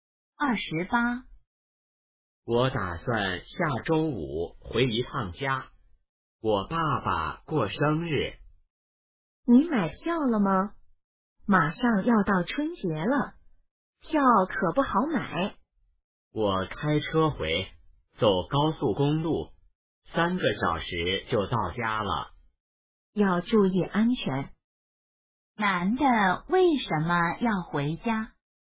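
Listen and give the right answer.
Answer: 他爸爸过生日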